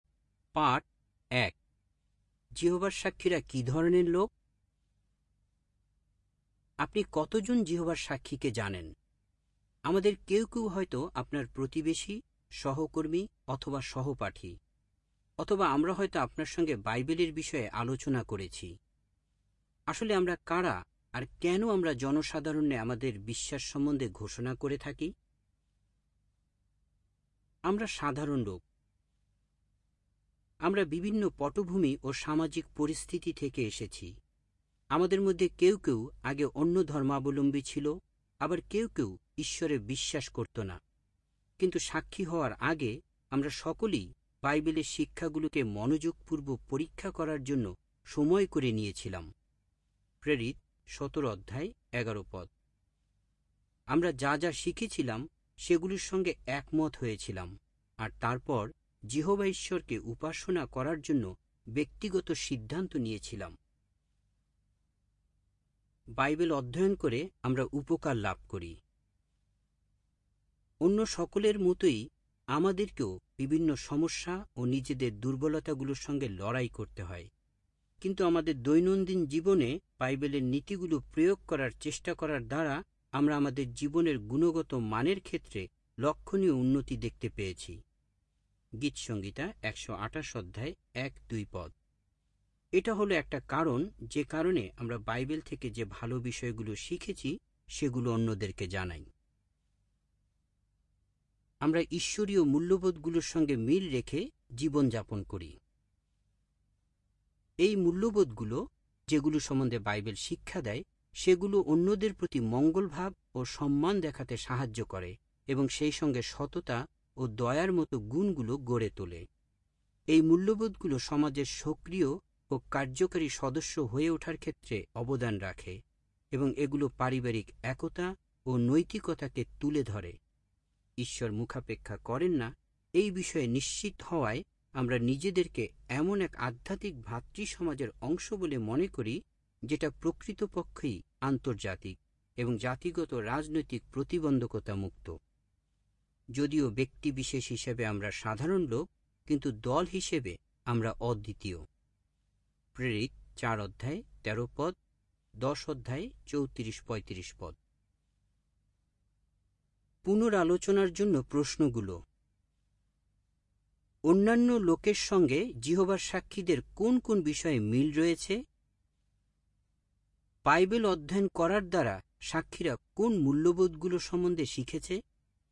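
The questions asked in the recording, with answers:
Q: অন্যান্য লোকের সঙ্গে যিহোবার সাক্ষীদের কোন কোন বিষয়ে মিল রয়েছে?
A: তারা সাধারণ লোক, বিভিন্ন পটভূমি থেকে আসা; অন্যদের মতোই সমস্যা ও দুর্বলতার সঙ্গে লড়াই করতে হয়

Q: Bible অধ্যয়ন করার দ্বারা সাক্ষীরা কোন মূল্যবোধগুলো সম্বন্ধে শিখেছে?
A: অন্যদের প্রতি মঙ্গলভাব ও সম্মান, সততা ও দয়া, পারিবারিক একতা ও নৈতিকতা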